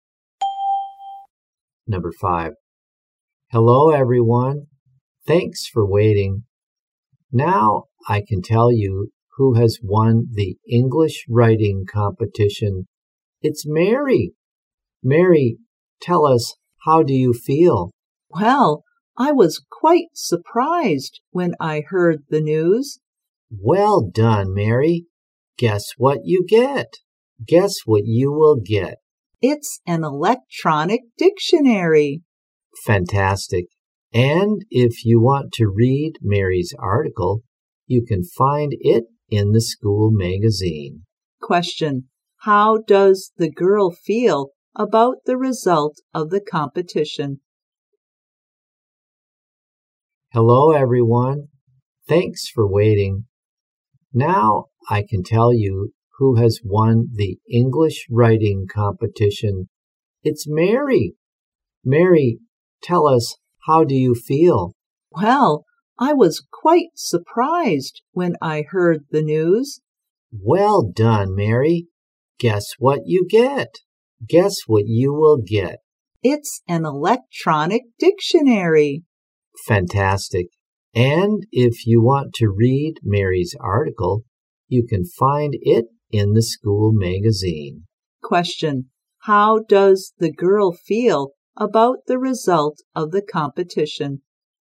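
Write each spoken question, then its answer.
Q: Question: how does the girl feel about the result of the competition?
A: Surprised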